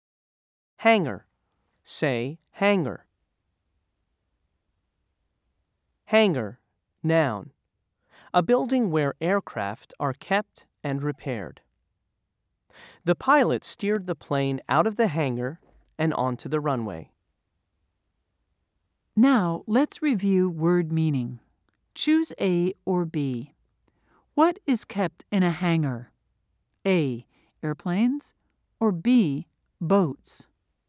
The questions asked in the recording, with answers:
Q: Choose A or B. What is kept in a hangar?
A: If you said A, you're right.